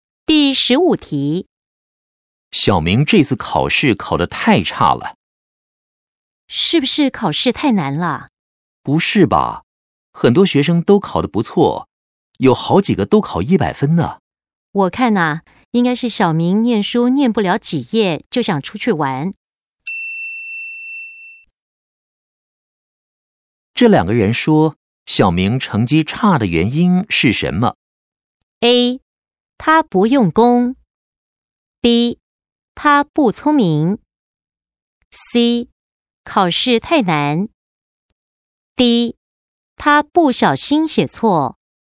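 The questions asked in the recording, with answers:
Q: 这两个人说小明成绩差的原因是什么?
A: A: 他不用功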